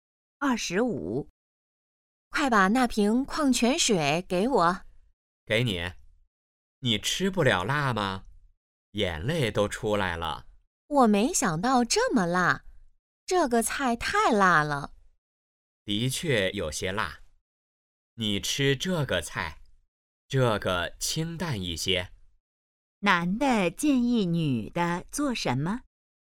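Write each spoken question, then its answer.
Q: 男的建议女的做什么?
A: 吃清淡一些的菜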